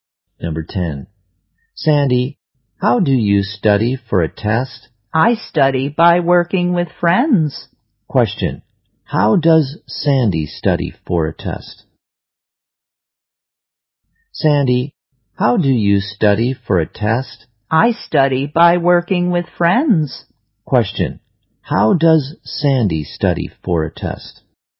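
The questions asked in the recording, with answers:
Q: How does Sandy study for a test?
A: By working with friends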